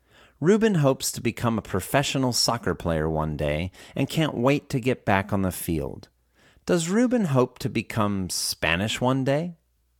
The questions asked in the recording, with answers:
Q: Does Reuben hope to become Spanish one day?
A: No, Reuben doesn't hope to become Spanish one day.